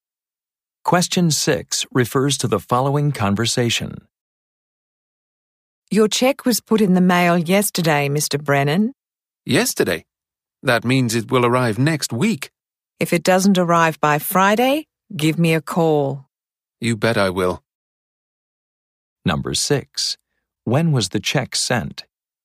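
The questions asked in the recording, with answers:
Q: When was the check sent?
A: Yesterday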